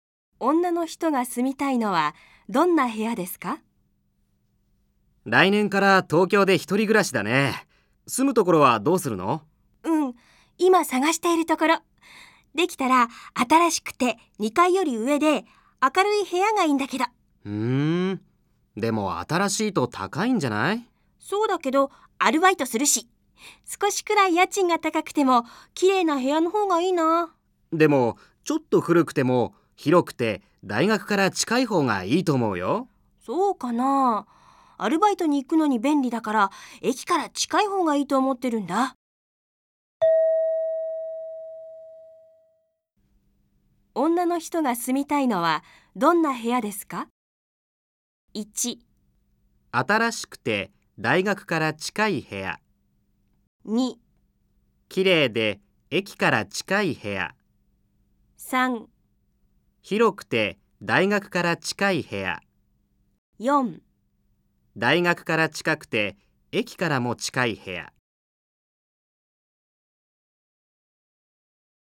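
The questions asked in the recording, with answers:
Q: 女の人が住みたいのはどんな部屋ですか?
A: 2: 綺麗で駅から近い部屋。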